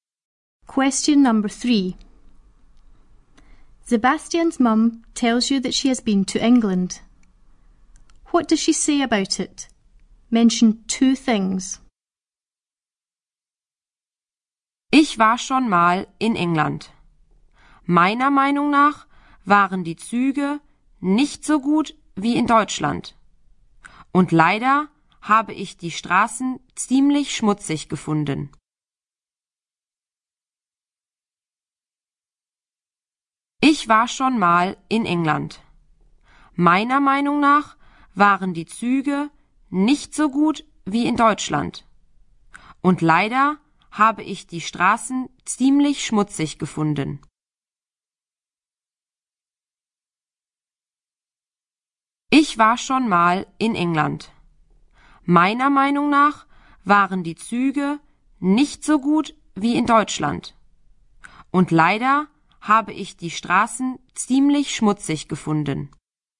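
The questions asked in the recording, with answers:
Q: What does she say about it?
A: The trains weren't as good as in Germany; the streets were quite dirty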